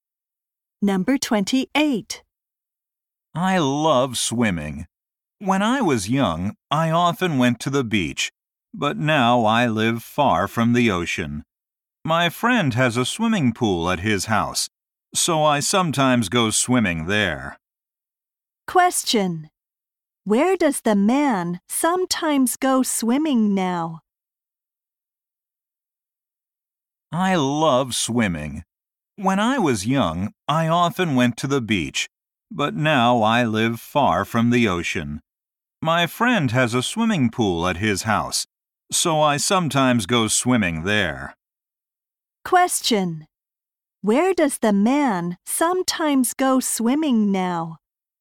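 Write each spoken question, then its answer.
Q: Where does the man sometimes go swimming now?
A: At his friend's house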